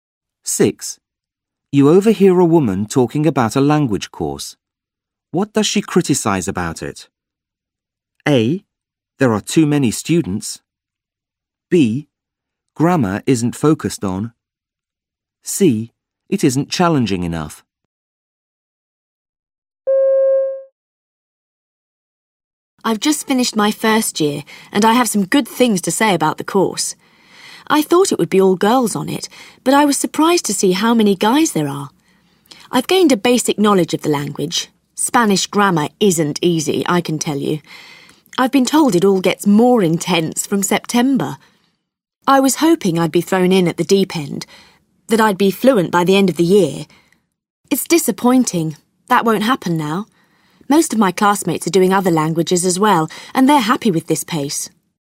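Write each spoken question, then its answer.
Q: What does she criticise about it?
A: C: It isn't challenging enough.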